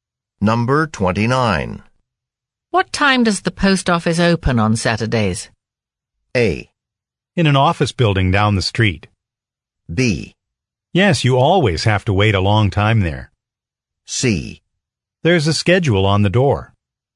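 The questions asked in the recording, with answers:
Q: What time does the post office open on Saturdays?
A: C: There's a schedule on the door.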